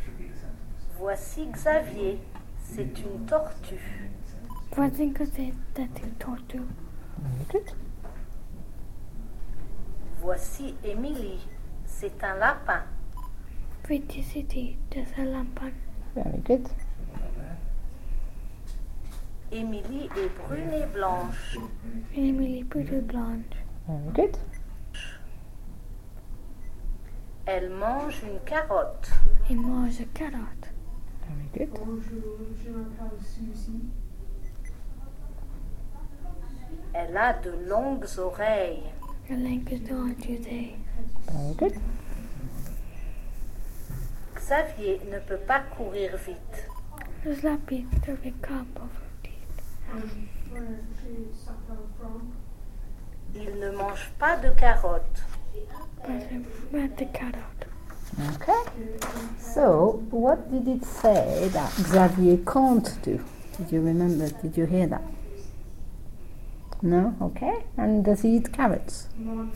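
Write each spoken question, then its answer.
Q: So, what did it say that Xavier can't do?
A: Run fast

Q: And does he eat carrots?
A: No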